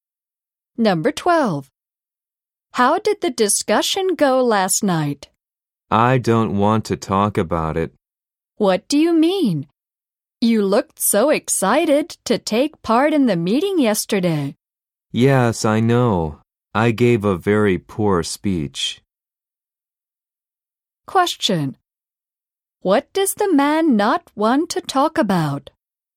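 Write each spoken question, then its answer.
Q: What does the man not want to talk about?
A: The discussion last night, where he gave a poor speech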